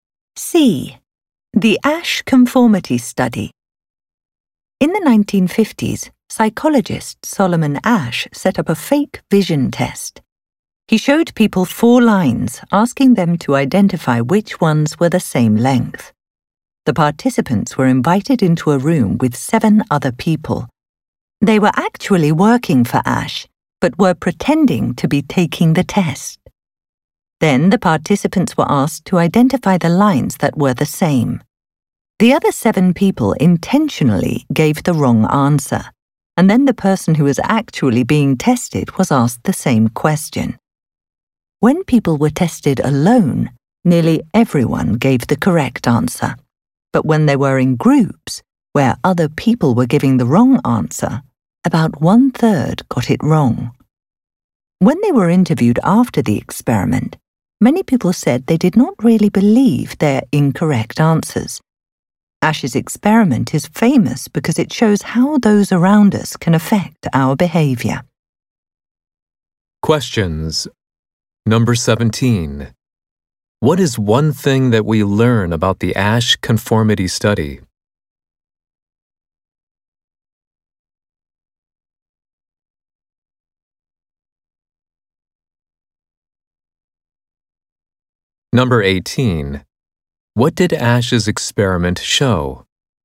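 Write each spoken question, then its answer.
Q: What did Asch's experiment show?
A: That the people around us can affect our behavior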